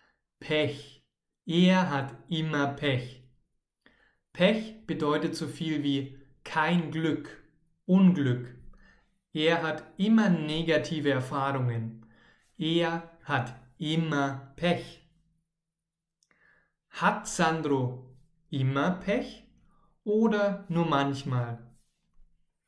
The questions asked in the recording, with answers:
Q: Hat Sandro immer Pech oder nur manchmal?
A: Immer. Er hat immer Pech.